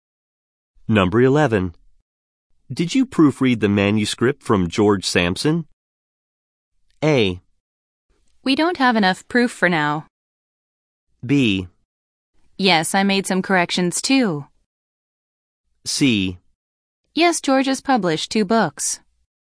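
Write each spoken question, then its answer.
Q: Did you proofread the manuscript from George Sampson?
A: B: Yes, I made some corrections too.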